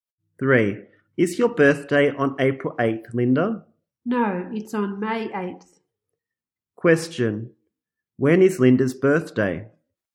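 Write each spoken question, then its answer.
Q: Question. When is Linda's birthday?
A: May 8th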